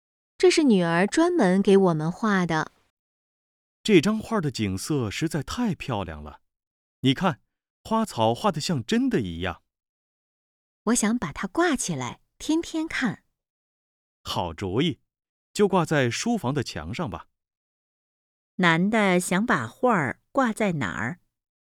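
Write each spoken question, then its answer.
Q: 男的想把画挂在哪儿?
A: 书房的墙上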